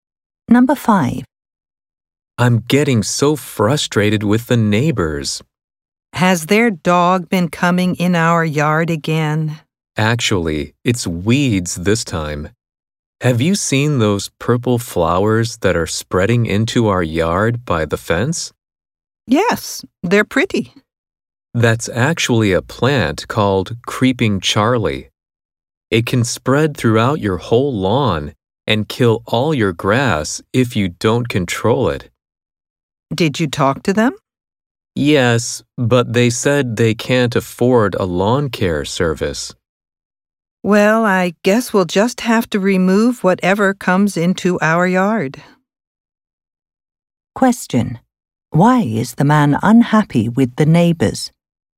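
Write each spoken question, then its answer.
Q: Why is the man unhappy with the neighbors?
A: Weeds (Creeping Charlie) from their yard are spreading into his yard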